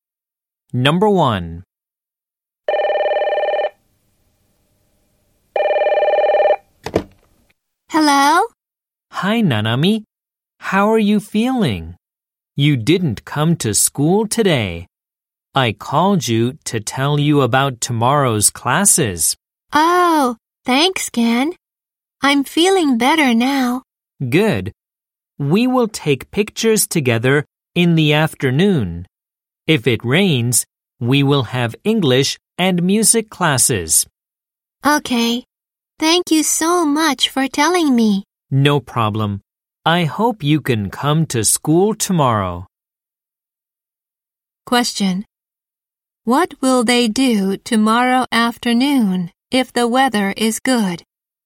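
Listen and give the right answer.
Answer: Take pictures together.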